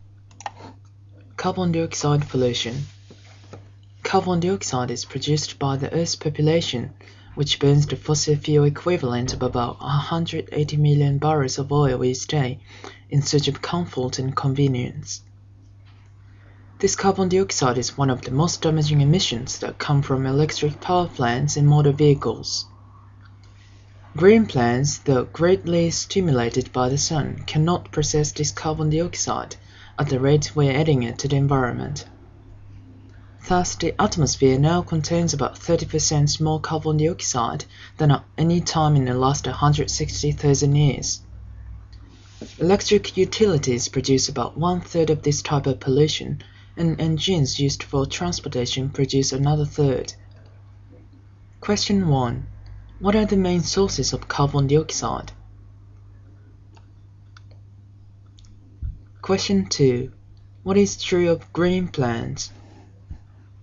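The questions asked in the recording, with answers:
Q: What are the main sources of carbon dioxide?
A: Electric power plants and motor vehicles (transportation engines)

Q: What is true of green plants?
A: They cannot process carbon dioxide as fast as we are adding it to the environment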